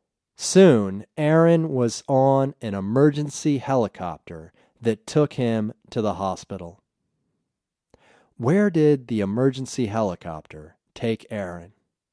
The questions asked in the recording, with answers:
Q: Where did the emergency helicopter take Aaron?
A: The emergency helicopter took Aaron to the hospital.